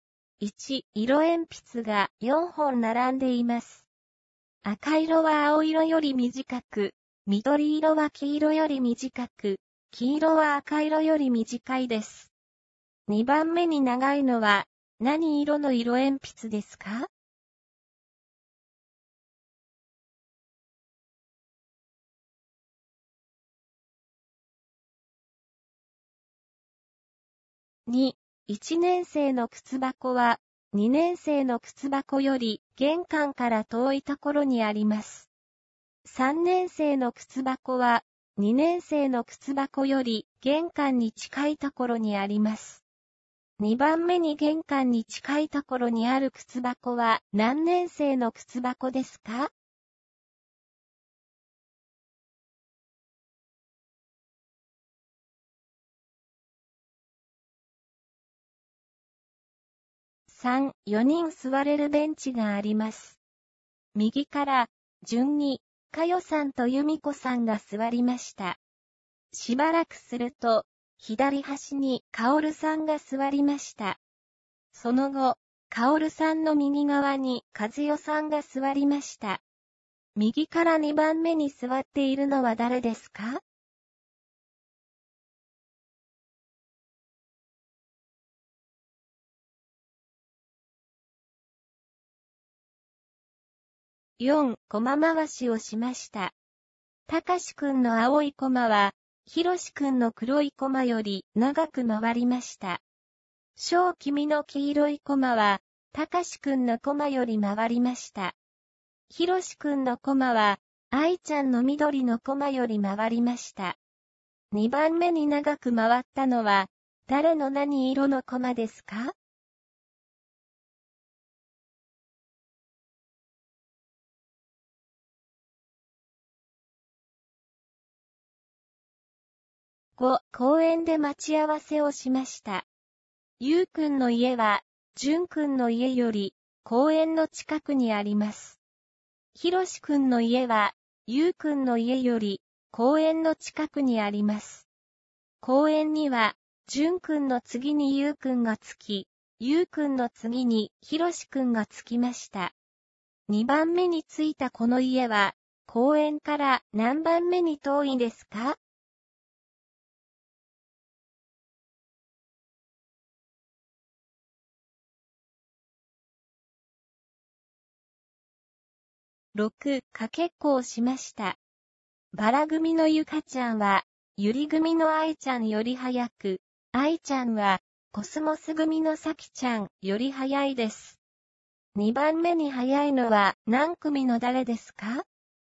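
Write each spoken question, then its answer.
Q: 2番目に長いのは、何色の色鉛筆ですか?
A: 赤色

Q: 2番目に玄関に近いところにある靴箱は何年生の靴箱ですか?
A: 2年生

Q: 右から2番目に座っているのは誰ですか?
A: ゆみこさん

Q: 2番目に着いたこの家は、公園から何番目に遠いですか?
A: 2番目

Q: 2番目に早いのは、何組の誰ですか?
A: ゆり組のあいちゃん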